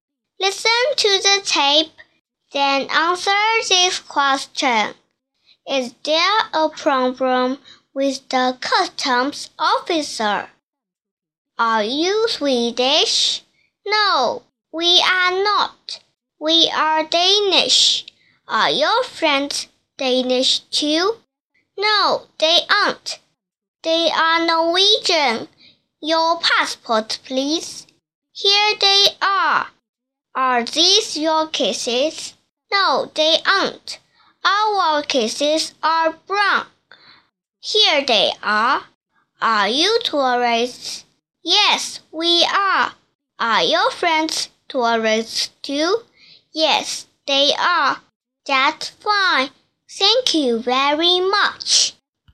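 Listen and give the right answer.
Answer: No, there isn't.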